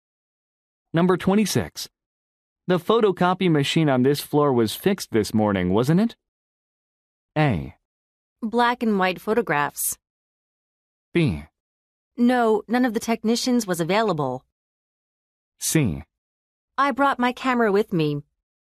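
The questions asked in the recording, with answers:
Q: The photocopy machine on this floor was fixed this morning, wasn't it?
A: B: No, none of the technicians was available.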